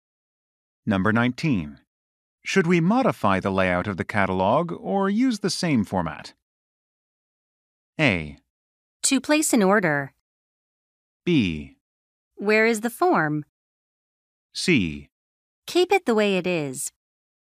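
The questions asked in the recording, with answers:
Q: Should we modify the layout of the catalog or use the same format?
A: C: Keep it the way it is.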